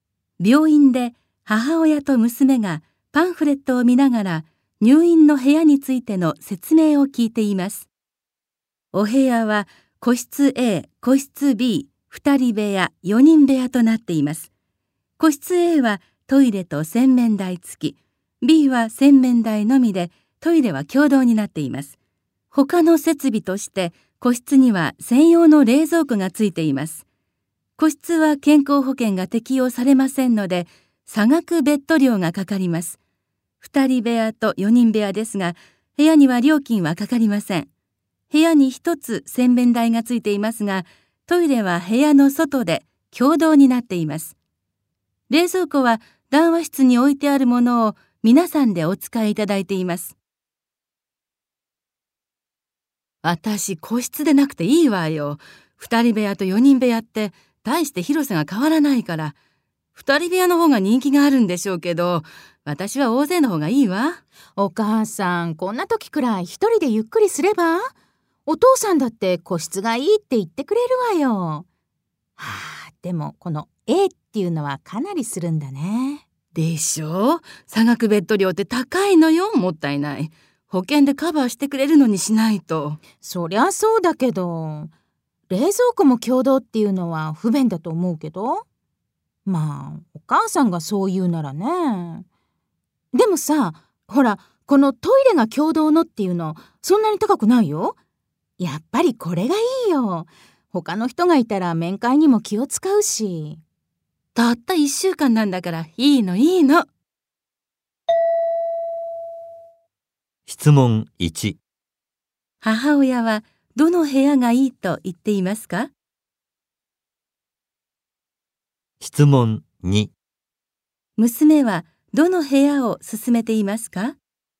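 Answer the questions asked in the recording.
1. 4人部屋
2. 個室B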